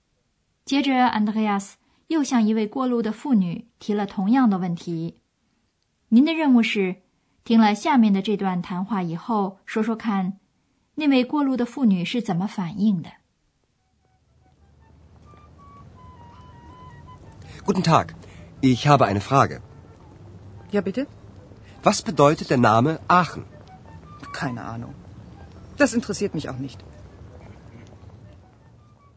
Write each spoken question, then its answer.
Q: 您的任务是听了下面的这段谈话以后说说看那位过路的妇女是怎么反应的。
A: Andreas 又不走运,因为那位过路的妇女说她一无所知。